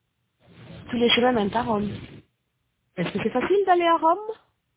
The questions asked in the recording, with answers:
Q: Est-ce que c'est facile d'aller à Rome?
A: Oui. Tous les chemins mènent à Rome.